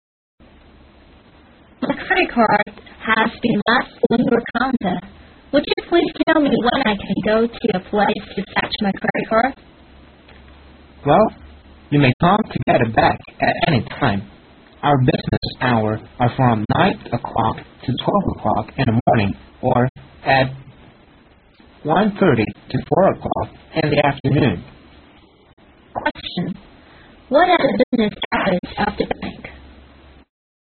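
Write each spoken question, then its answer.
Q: What are the business hours of the bank?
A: 9 to 12 in the morning and 1:30 to 4 in the afternoon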